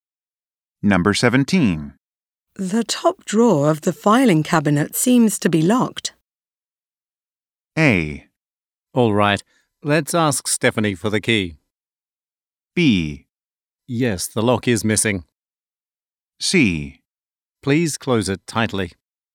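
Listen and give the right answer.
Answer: A: All right. Let's ask Stephanie for the key.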